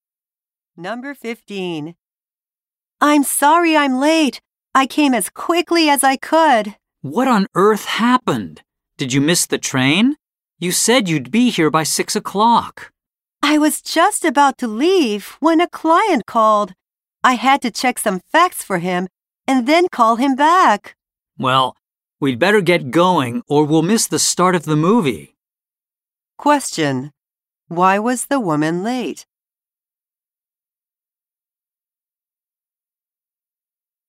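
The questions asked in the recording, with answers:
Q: Why was the woman late?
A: A client called and she had to check some facts and call him back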